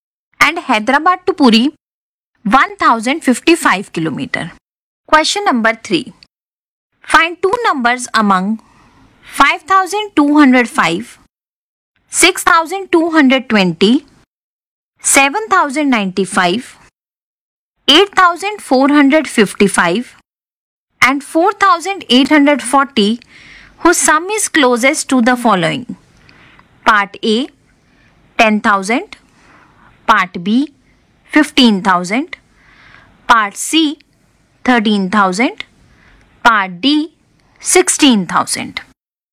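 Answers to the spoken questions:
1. 5205 and 4840 (10,045)
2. 6220 and 8455 (14,675)
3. 8455 and 4840 (13,295)
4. 7095 and 8455 (15,550)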